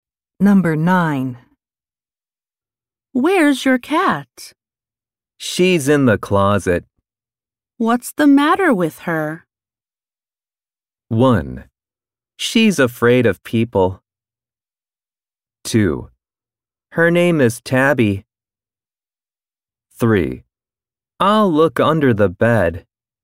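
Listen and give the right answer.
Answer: 1: She's afraid of people.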